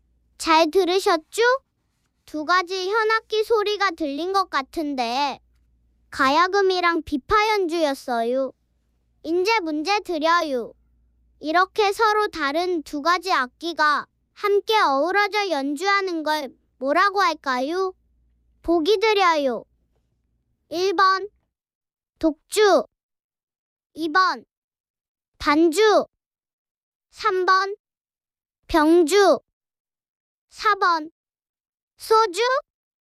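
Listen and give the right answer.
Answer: 3번: 병주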